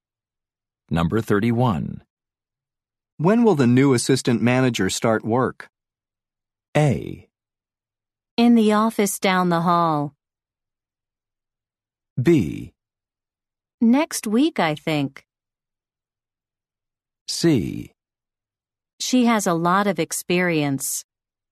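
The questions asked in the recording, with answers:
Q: When will the new assistant manager start work?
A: B: Next week, I think.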